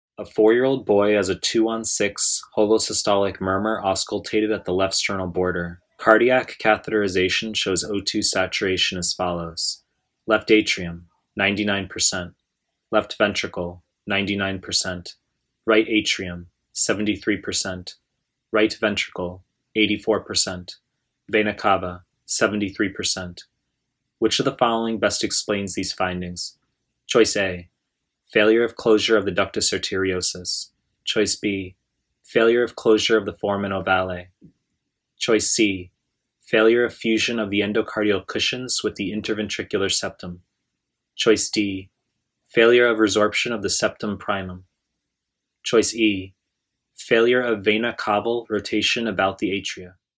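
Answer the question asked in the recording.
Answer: C: failure of fusion of the endocardial cushions with the interventricular septum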